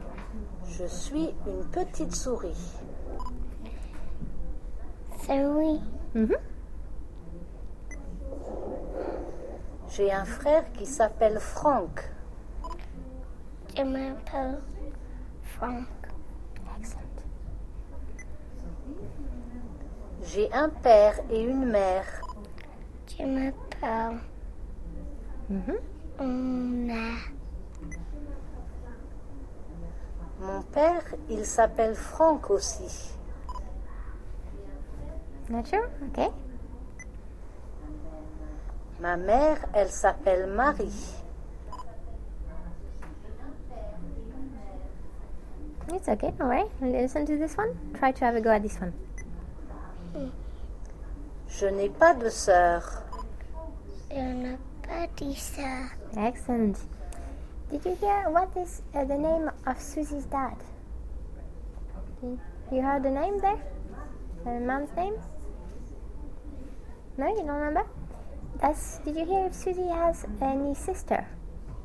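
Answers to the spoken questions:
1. Franck
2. No, she has no sister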